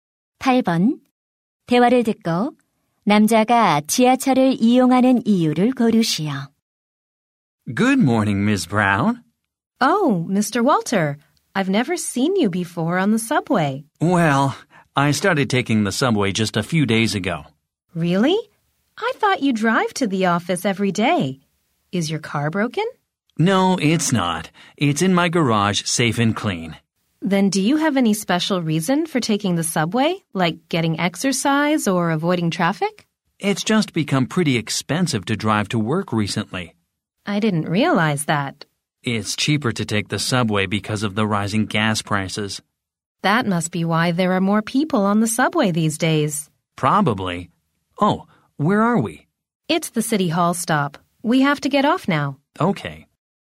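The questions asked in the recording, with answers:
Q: 대화를 듣고 남자가 지하철을 이용하는 이유를 고르시오.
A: 기름값이 올라 운전하는 비용이 비싸져서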